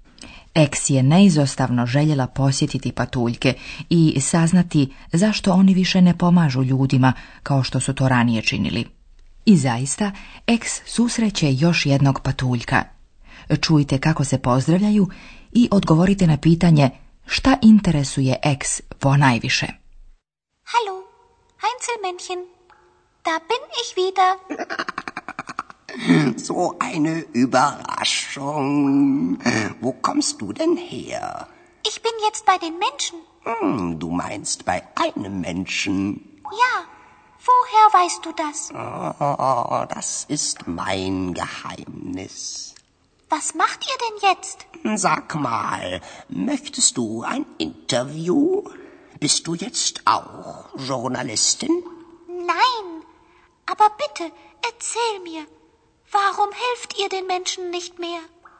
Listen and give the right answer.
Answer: Eks ponajviše zanima zašto patuljci više ne pomažu ljudima.